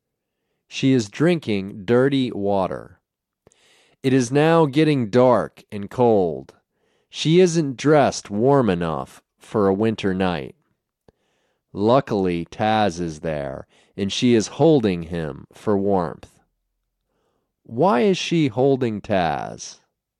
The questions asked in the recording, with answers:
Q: Why is she holding Taz?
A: She is holding Taz for warmth.